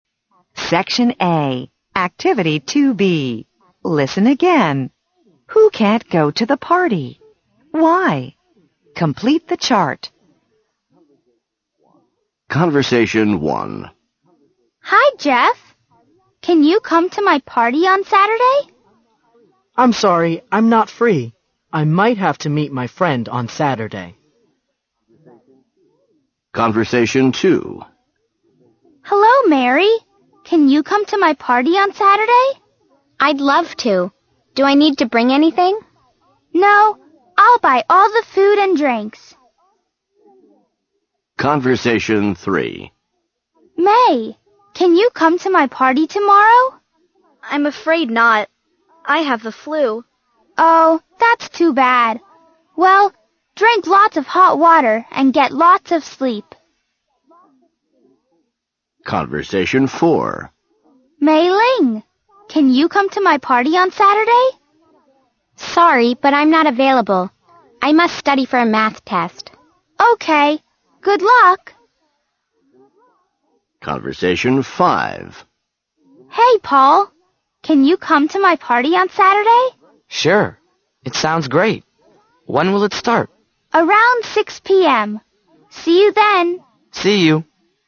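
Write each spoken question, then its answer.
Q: Who can't go to the party?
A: Jeff, May and Mei Ling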